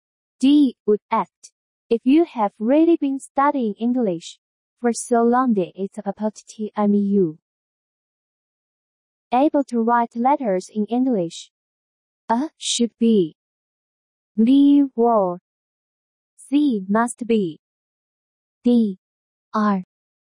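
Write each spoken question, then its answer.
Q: If you have really been studying English for so long, that it's about time you able to write letters in English.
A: B: were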